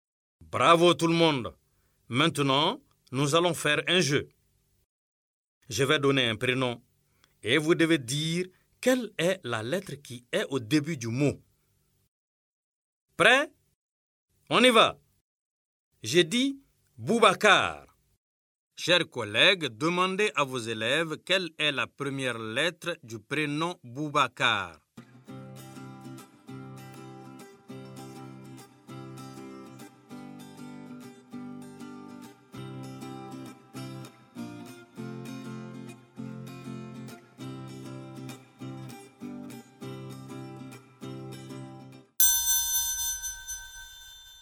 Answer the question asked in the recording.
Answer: Monsieur, Boubacar commence par la lettre B.